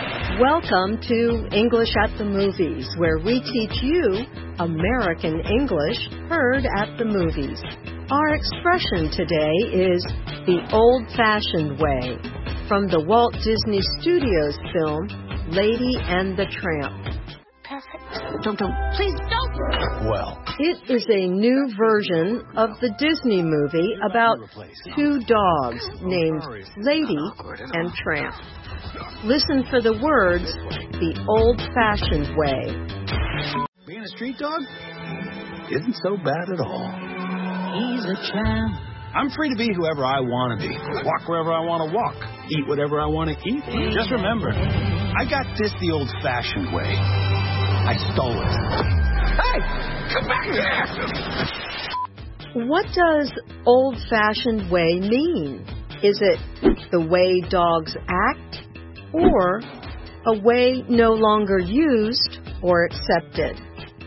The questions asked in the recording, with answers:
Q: What does old-fashioned way mean?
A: The answer is B. Old-fashioned way means a method that is no longer used or accepted.